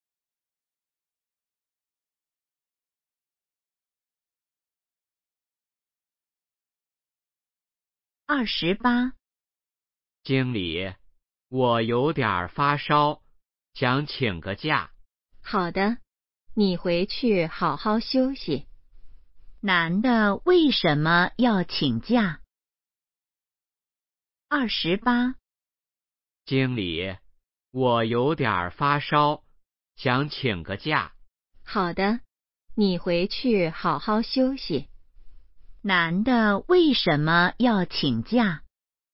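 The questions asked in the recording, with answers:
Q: 男的为什么要请假?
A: 发烧了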